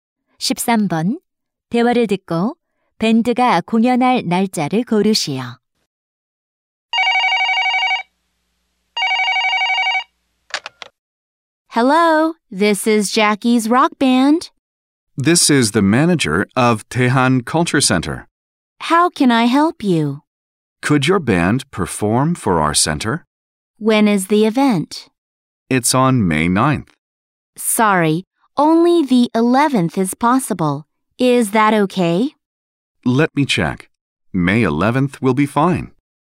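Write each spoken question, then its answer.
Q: 대화를 듣고 밴드가 공연할 날짜를 고르시오.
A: 5월 11일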